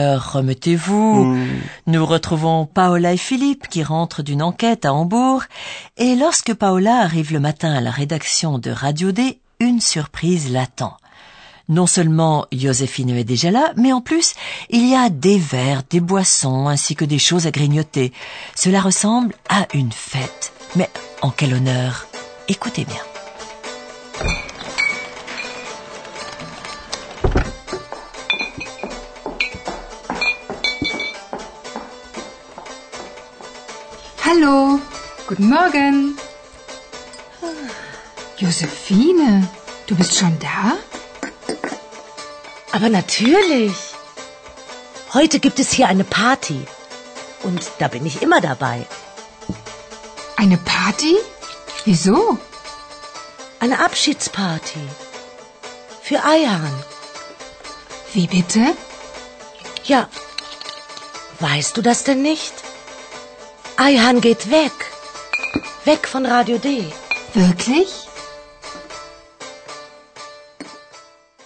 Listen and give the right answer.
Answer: La petite fête, comme vous l'avez certainement compris, est organisée en l'honneur d'Ayhan.